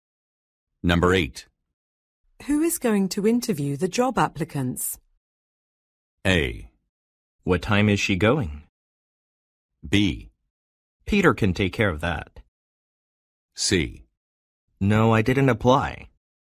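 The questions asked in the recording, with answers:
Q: Who is going to interview the job applicants?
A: B: Peter can take care of that.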